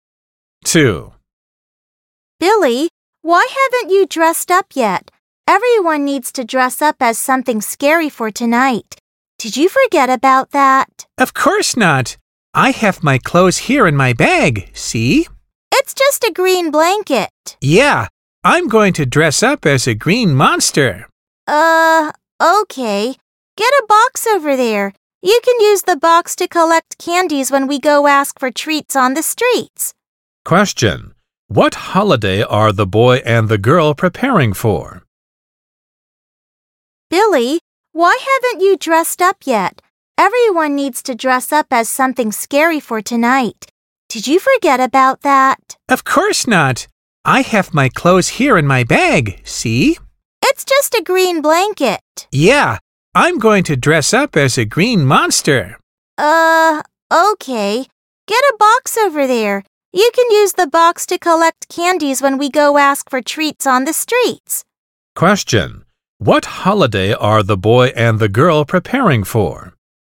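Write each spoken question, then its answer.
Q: What holiday are the boy and the girl preparing for?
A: Halloween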